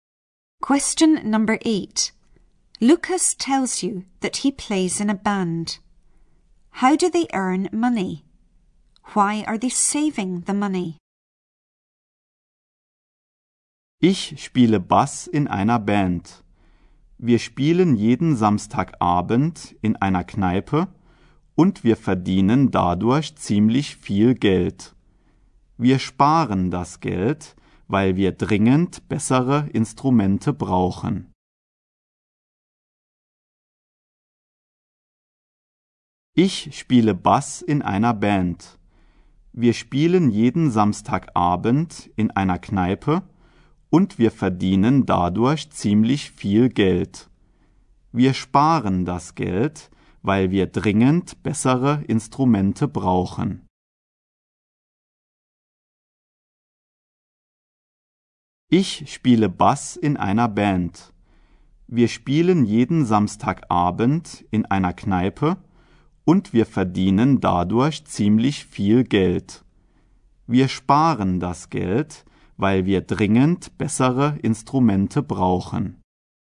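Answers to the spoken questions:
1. They play in a pub every Saturday evening
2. They urgently need better instruments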